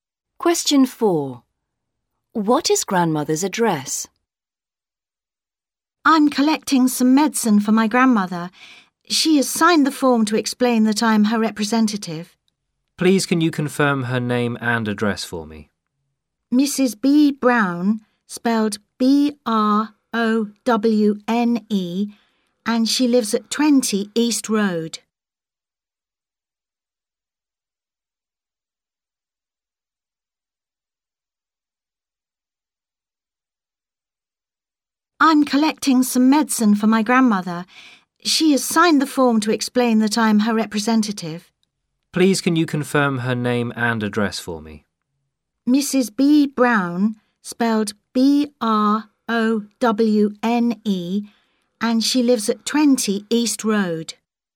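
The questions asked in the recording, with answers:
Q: What is grandmother's address?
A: 20 East Road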